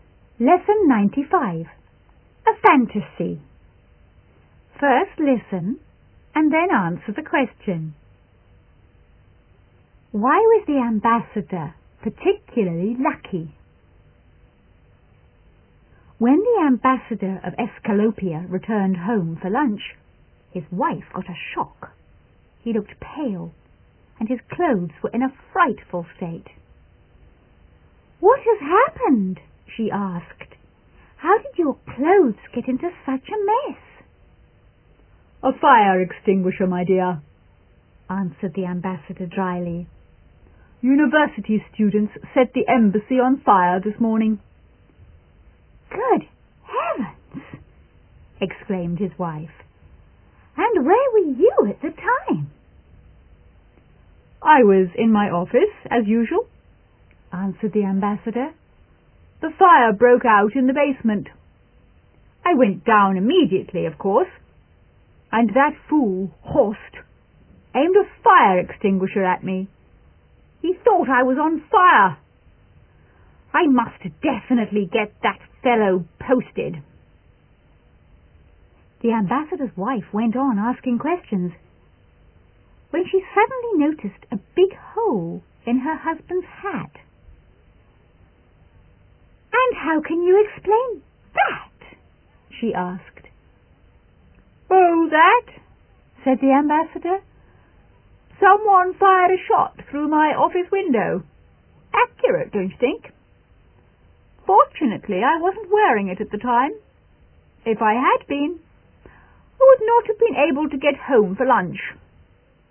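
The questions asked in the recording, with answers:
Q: Why was the ambassador particularly lucky?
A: He wasn't wearing his hat when someone fired a shot through it, so he wasn't hurt.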